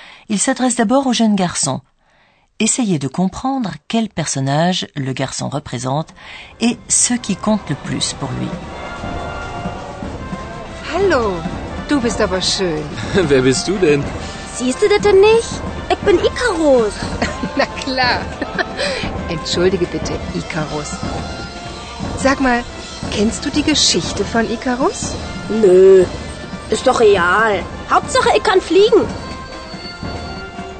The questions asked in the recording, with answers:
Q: Essayez de comprendre quel personnage le garçon représente et ce qui compte le plus pour lui.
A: Comme vous l'avez compris, le jeune garçon représente Icarus, un personnage de la mythologie grecque.